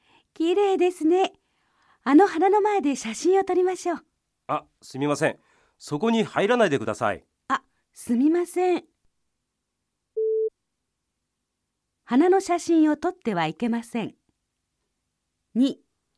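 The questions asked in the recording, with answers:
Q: 花の写真を撮ってはいけません。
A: ×(花の前に入ってはいけないだけ)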